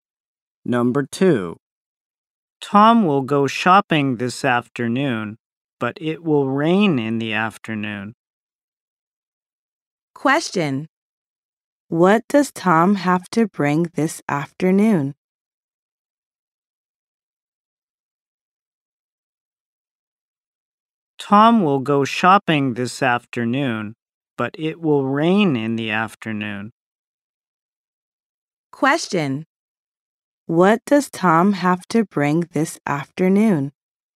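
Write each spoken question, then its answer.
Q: What does Tom have to bring this afternoon?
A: An umbrella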